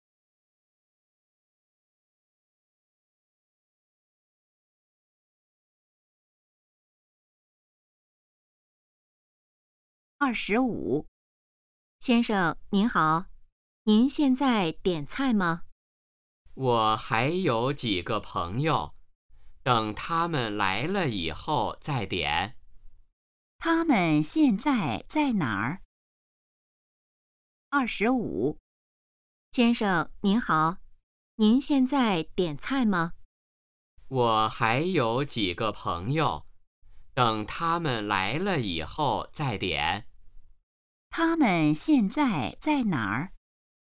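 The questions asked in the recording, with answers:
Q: 他们现在在哪儿?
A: 饭馆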